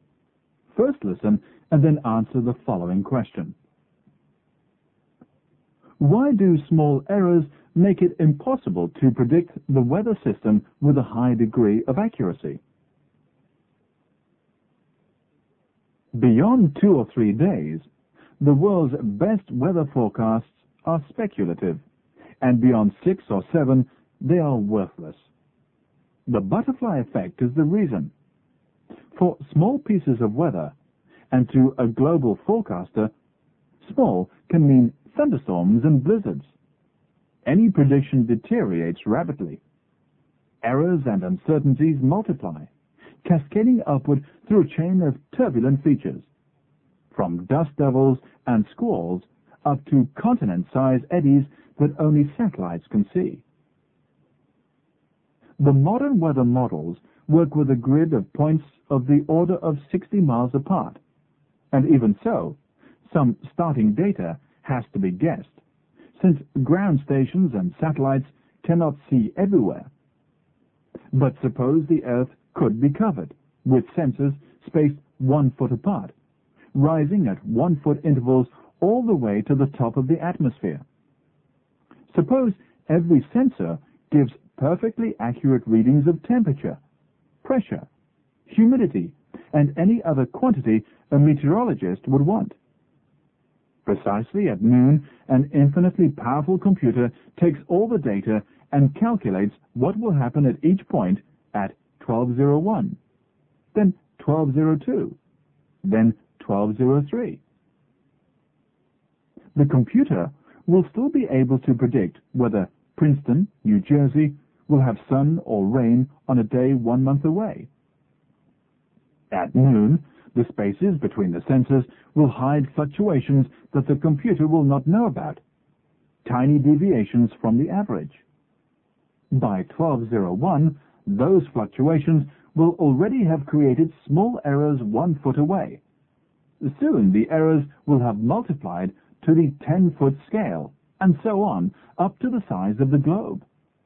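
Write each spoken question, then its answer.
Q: Why do small errors make it impossible to predict the weather system with a high degree of accuracy?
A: Because small errors and uncertainties multiply rapidly, cascading upward through a chain of turbulent features until they reach the size of the globe (the butterfly effect).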